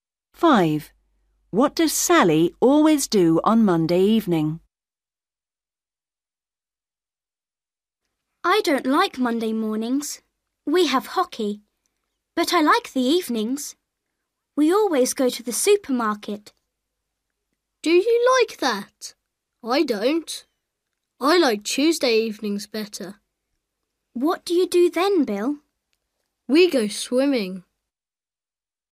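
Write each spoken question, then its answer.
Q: What does Sally always do on Monday evening?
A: goes to the supermarket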